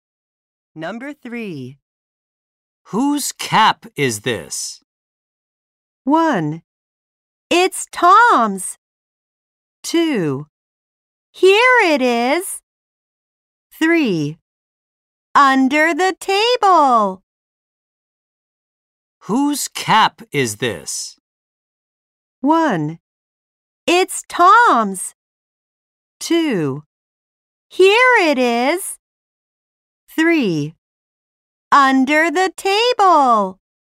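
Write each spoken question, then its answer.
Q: Whose cap is this?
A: 1: It's Tom's.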